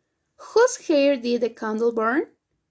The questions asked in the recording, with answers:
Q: Whose hair did the candle burn?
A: Emily's, Emily's hair. It burned Emily's hair.